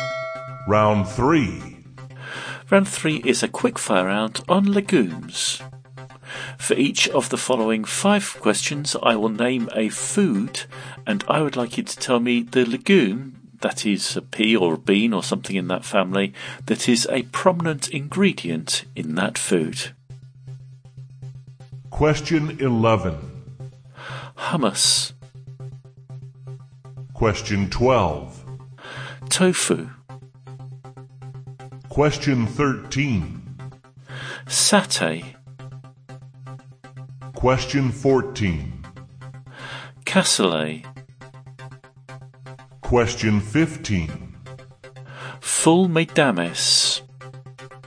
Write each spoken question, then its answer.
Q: Hummus.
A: hummus is chickpeas or garbanzo beans.

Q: Tofu.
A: tofu is soybeans.

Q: Satay.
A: satay is peanuts.

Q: Cassoulet.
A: cassoulet is haricot or navy beans.

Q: Full medames.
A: is broad beans or fava beans.